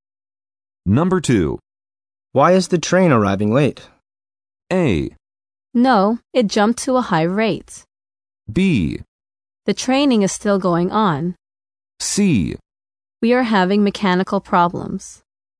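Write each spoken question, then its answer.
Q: Why is the train arriving late?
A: C: We are having mechanical problems.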